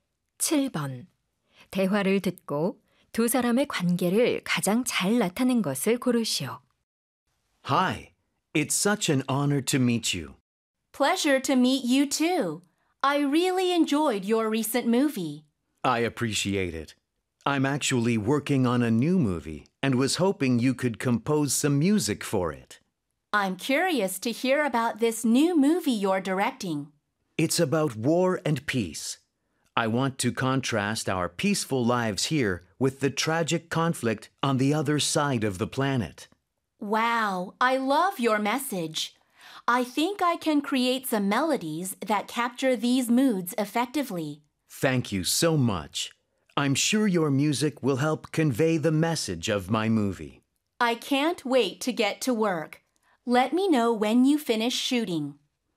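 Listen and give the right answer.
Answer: 영화감독 — 작곡가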